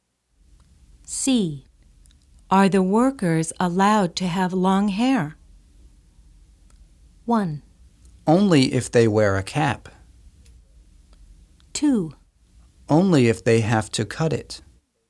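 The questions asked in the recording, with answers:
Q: Are the workers allowed to have long hair?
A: 1: Only if they wear a cap.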